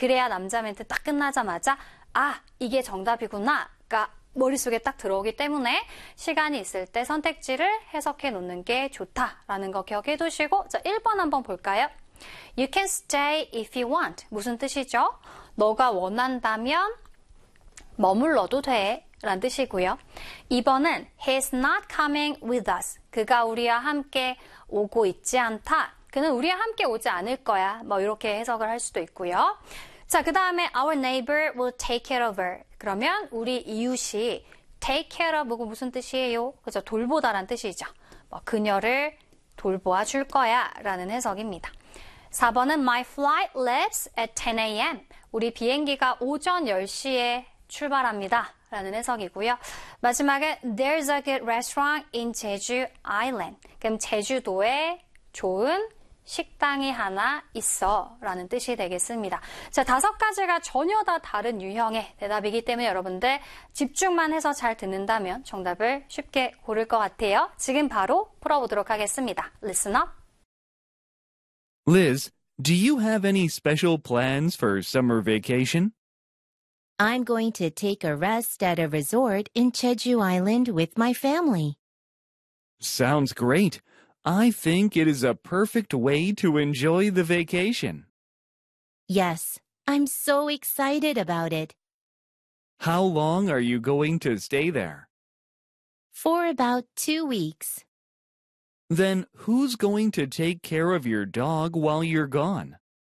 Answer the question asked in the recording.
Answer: 자, 그래서 정답은 몇 번입니까? 3번에 보시면 Our neighbor will take care of her.